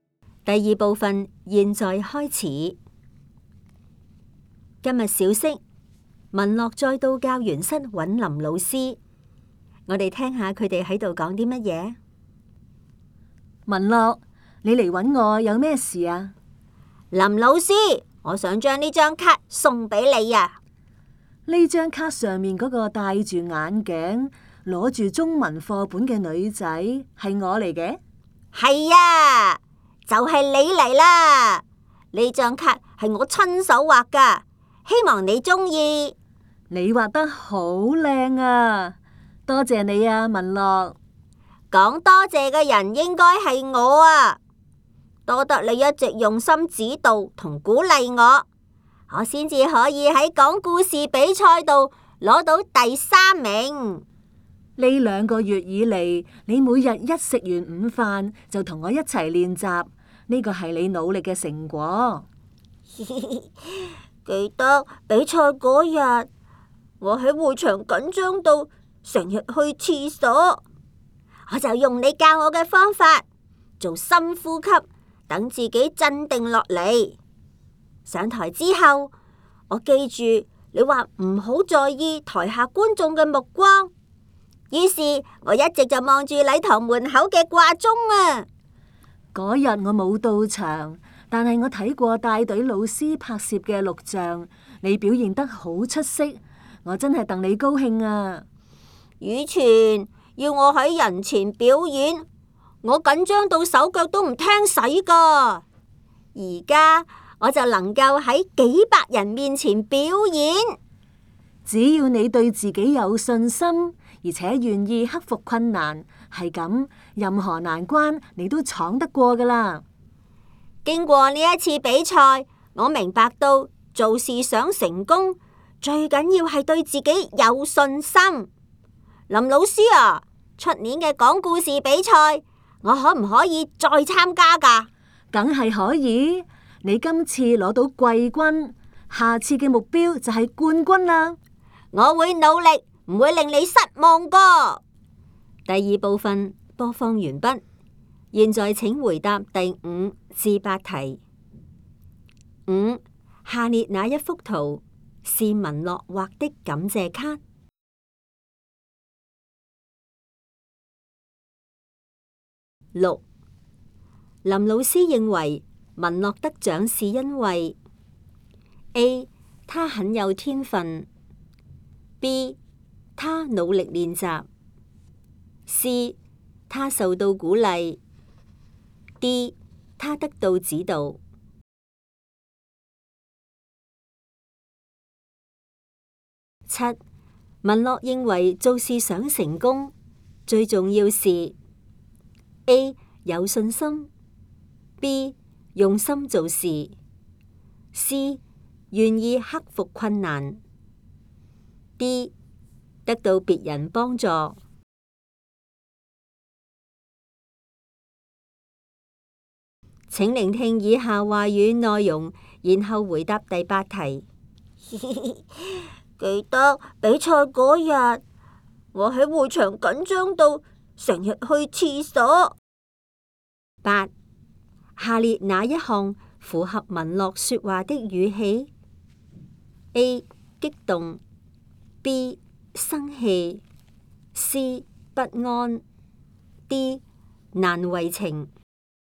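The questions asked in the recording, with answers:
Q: 林老师认为文乐得奖是因为 A 他很有天分, B 他努力练习, C 他受到鼓励, D 他得到指导。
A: B: 他努力练习

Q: 文乐认为做事想成功最重要是A 有信心, B 用心做事, C 愿意克服困难, D 得到别人帮助。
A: A: 有信心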